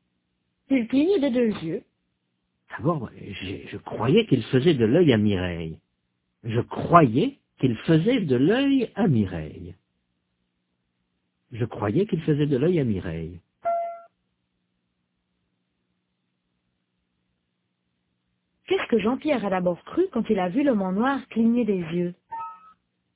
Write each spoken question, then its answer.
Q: Qu'est-ce que Jean-Pierre a d'abord cru quand il a vu l'homme en noir cligner des yeux?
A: Il a cru qu'il faisait de l'œil à Mireille.